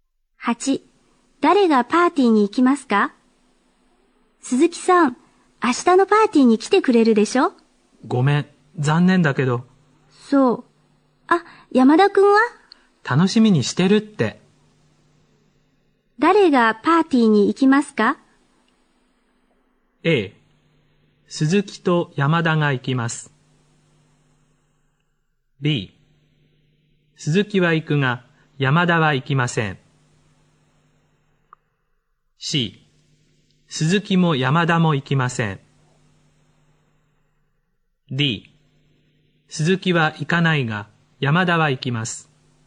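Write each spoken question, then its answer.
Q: 誰がパーティーに行きますか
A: D: 鈴木は行かないが、山田は行きます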